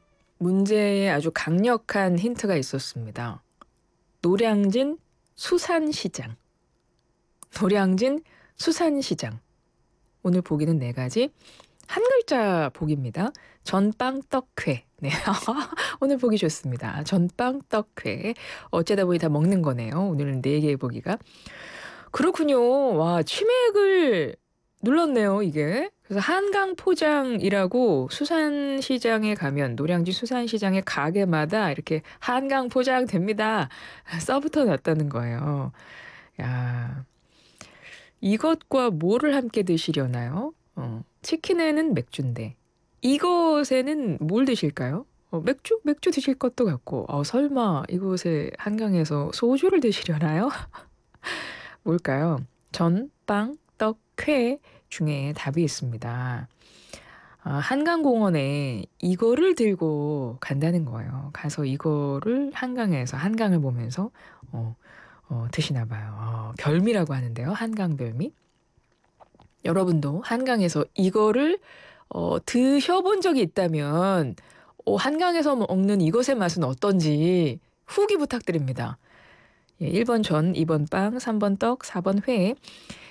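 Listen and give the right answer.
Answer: 4: 회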